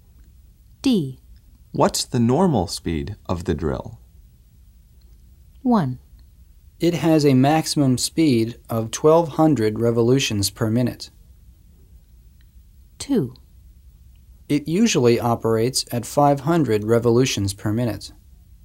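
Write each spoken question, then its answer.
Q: What's the normal speed of the drill?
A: 2: It usually operates at 500 revolutions per minute.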